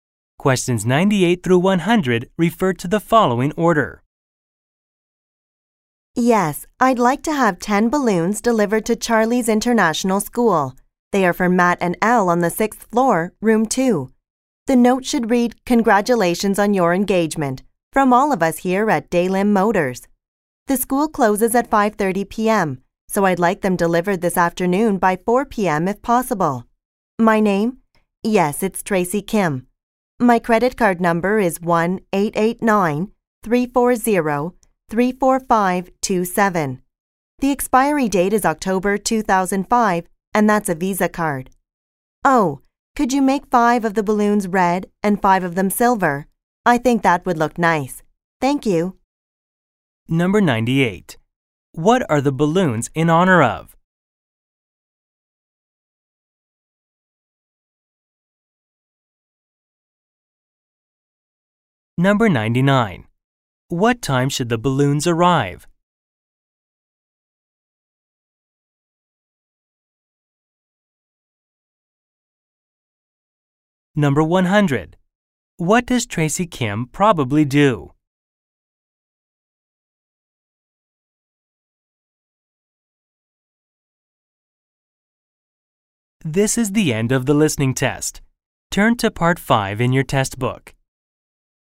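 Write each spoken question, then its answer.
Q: What are the balloons in honor of?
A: An engagement

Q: What time should the balloons arrive?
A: By 4 p.m.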